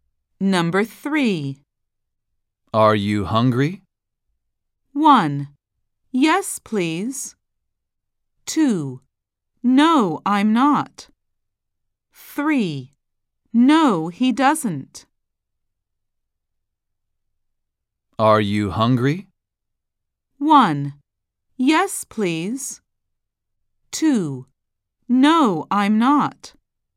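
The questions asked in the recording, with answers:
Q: Are you hungry?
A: 2: No, I'm not.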